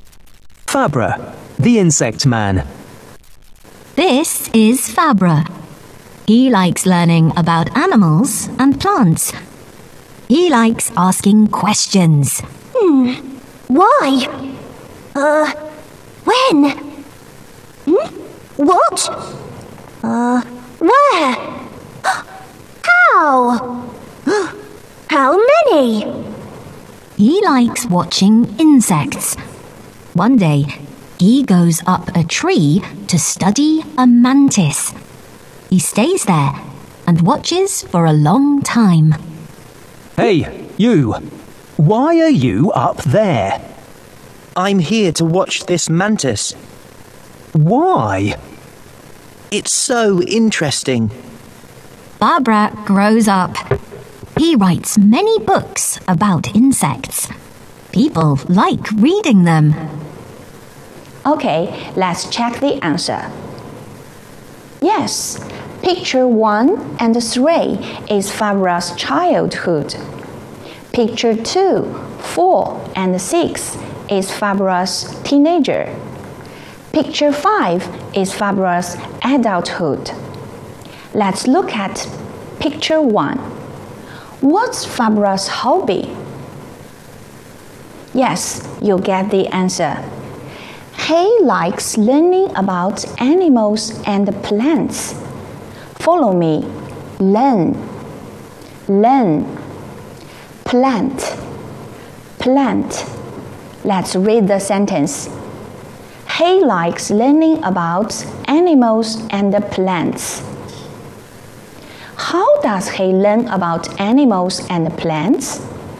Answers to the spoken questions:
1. He likes learning about animals and plants.
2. He learns about animals and plants by asking questions and watching insects.